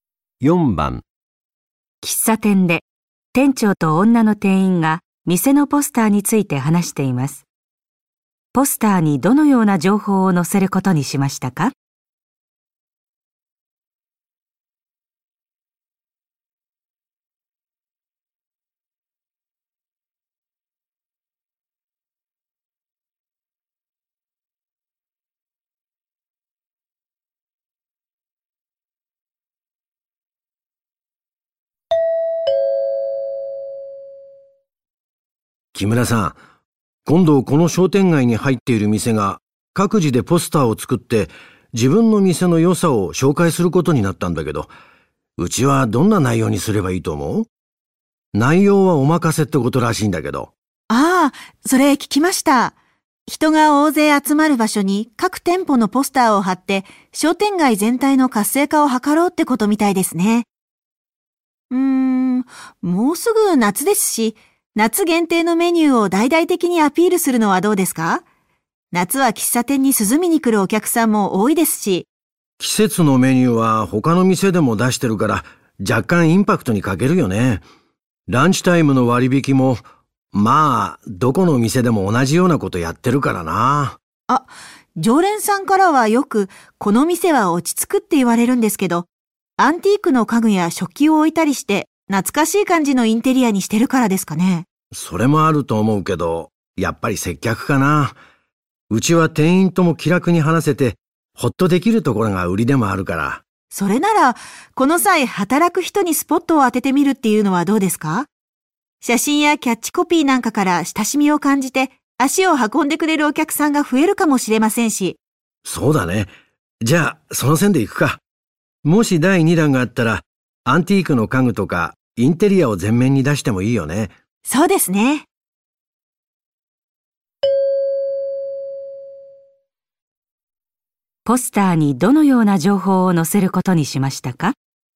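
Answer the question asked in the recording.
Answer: 店で働く人(店員)を紹介する情報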